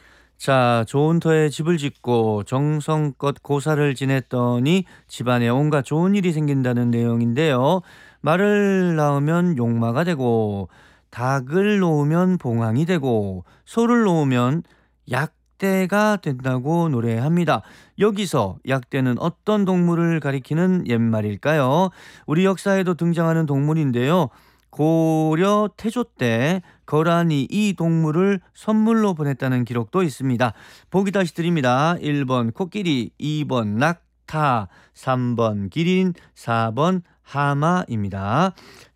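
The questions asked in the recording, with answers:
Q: 여기서 약대는 어떤 동물을 가리키는 옛말일까요?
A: 2: 낙타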